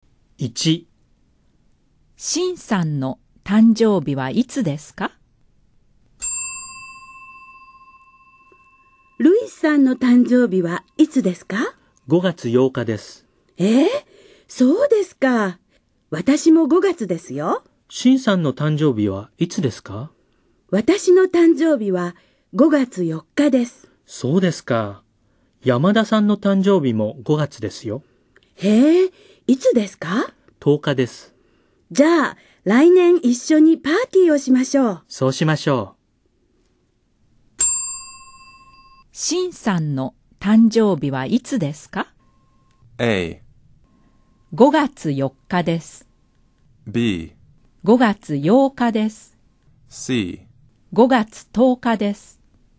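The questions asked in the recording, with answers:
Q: シンさんの誕生日はいつですか?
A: A: 5月4日です。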